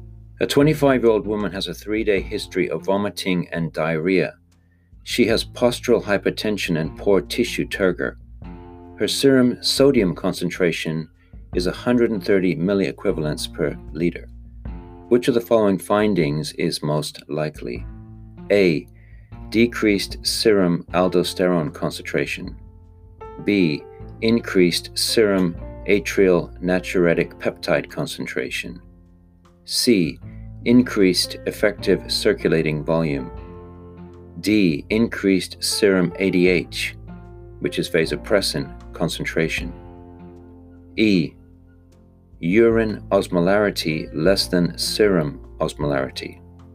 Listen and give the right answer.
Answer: The answer here is D, increased serum ADH, vasopressin, concentration.